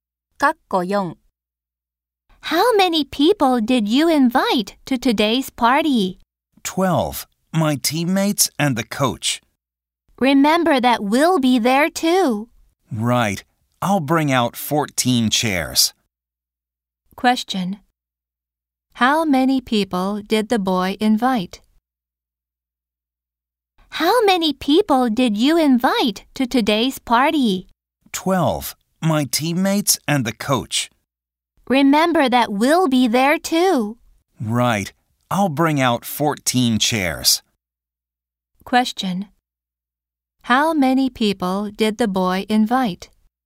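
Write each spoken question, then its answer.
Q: How many people did the boy invite?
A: 12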